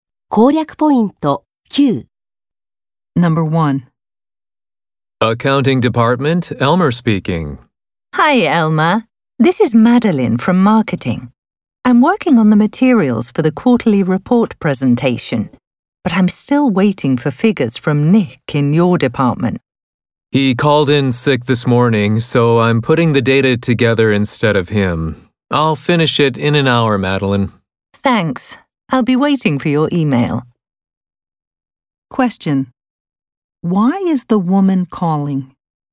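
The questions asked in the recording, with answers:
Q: Why is the woman calling?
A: To check on the figures she needs from the accounting department for the quarterly report presentation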